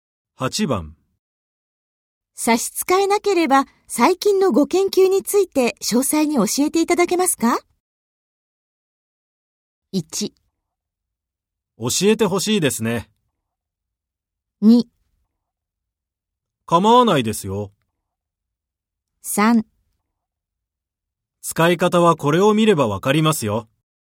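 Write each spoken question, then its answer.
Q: 差し支えなければ、最近のご研究について詳細に教えていただけますか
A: 2: 構わないですよ。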